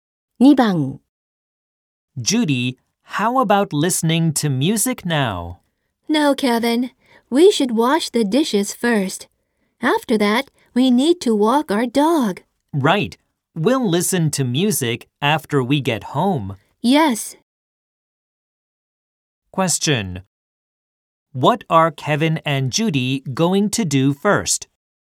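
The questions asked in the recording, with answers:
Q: What are Kevin and Judy going to do first?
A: Wash the dishes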